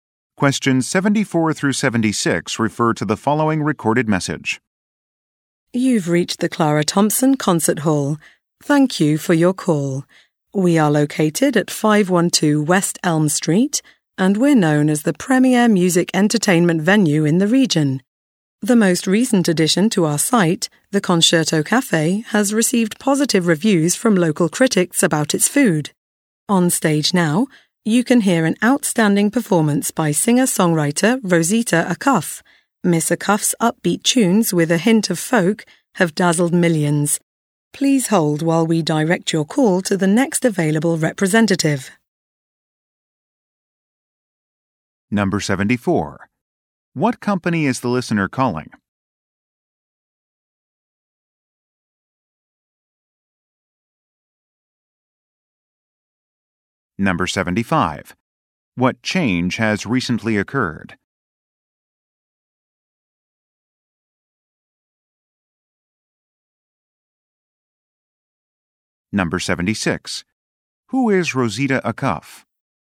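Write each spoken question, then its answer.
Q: What company is the listener calling?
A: A concert hall

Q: What change has recently occurred?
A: A cafe was added

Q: Who is Rosita Acuff?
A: A singer-songwriter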